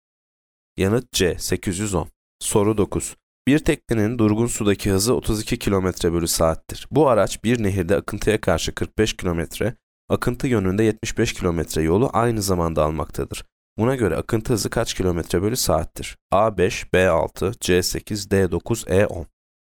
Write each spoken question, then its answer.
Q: Buna göre akıntı hızı kaç kilometre bölü saattir?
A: Yanıt C 8.